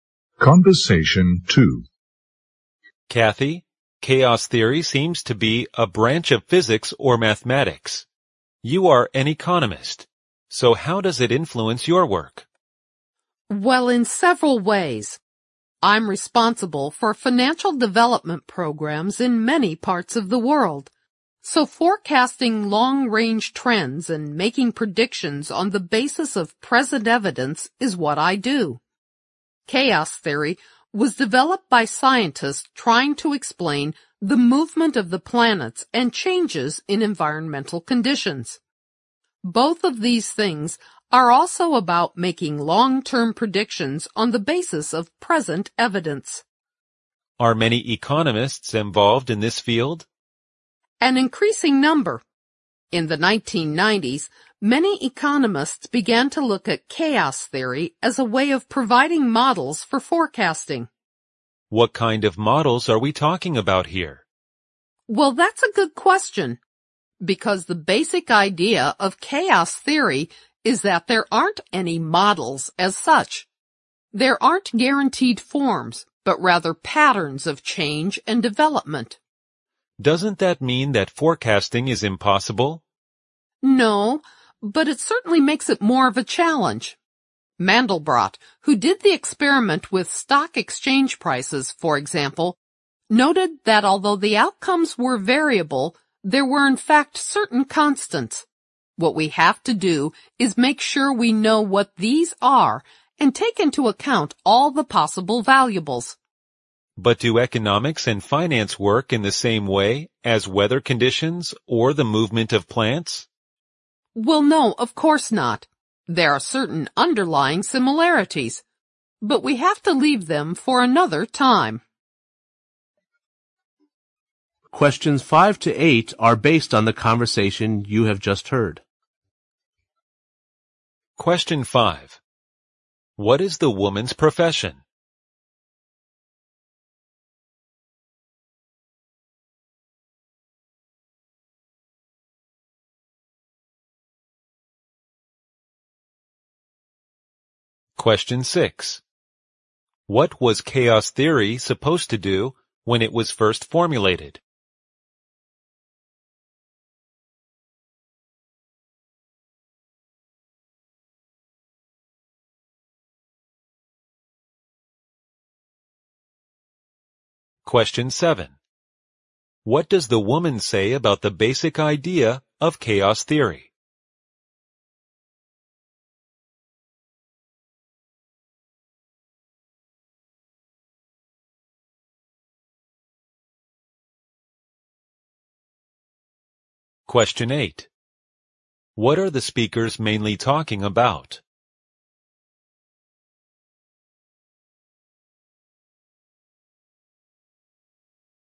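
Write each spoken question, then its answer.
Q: What is the woman's profession?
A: An economist

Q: What was chaos theory supposed to do when it was first formulated?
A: Explain the movement of the planets and changes in environmental conditions

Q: What does the woman say about the basic idea of chaos theory?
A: There aren't any models as such, only patterns of change and development

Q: What are the speakers mainly talking about?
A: How chaos theory is applied to economic forecasting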